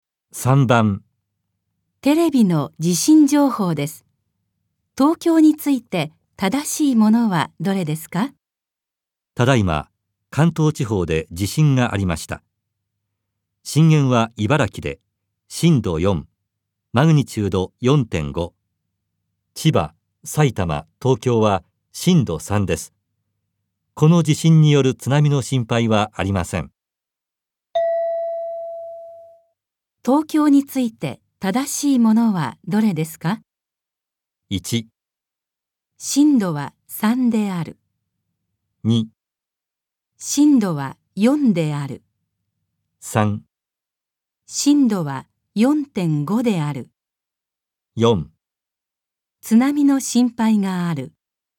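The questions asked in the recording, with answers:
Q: 東京について正しいものはどれですか?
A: 1: 震度は3である。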